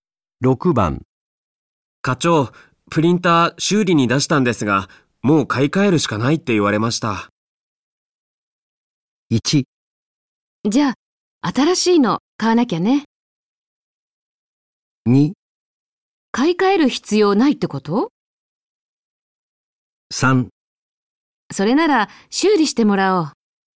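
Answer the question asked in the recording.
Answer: 1: じゃあ、新しいの買わなきゃね。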